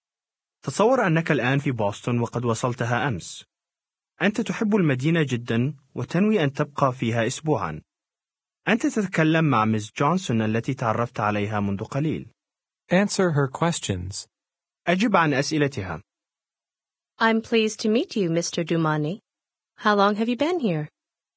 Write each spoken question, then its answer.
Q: How long have you been here?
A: Since yesterday.